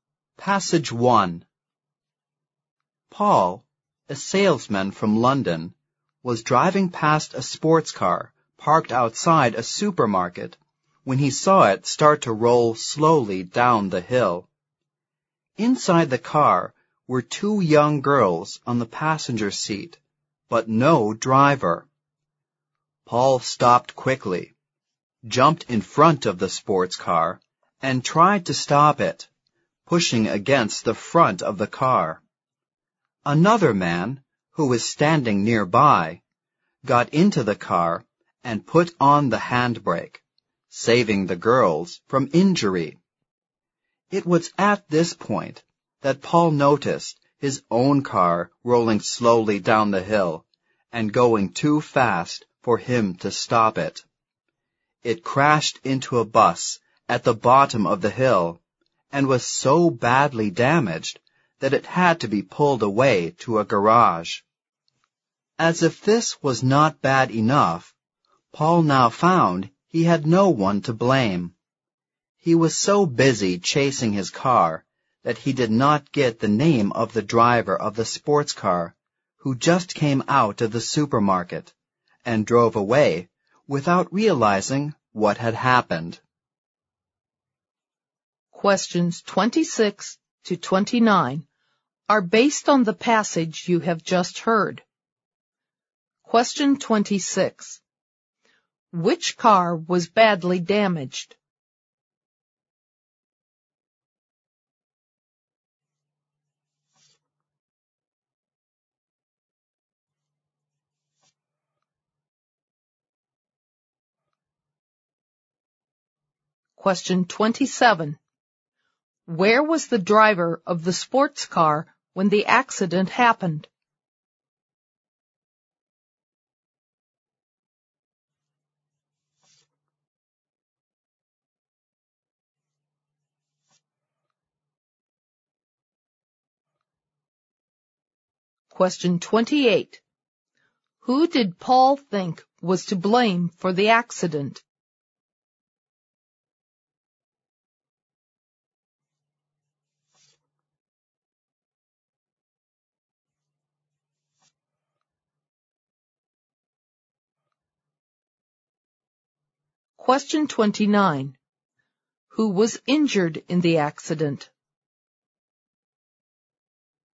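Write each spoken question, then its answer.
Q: Which car was badly damaged?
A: Paul's own car

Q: Where was the driver of the sports car when the accident happened?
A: In the supermarket

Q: Who was injured in the accident?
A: Nobody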